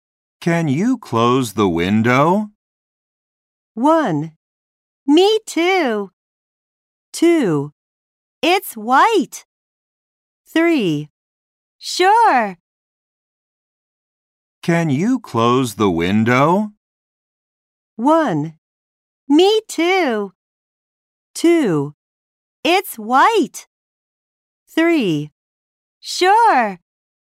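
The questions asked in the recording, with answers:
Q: Can you close the window?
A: 3: Sure.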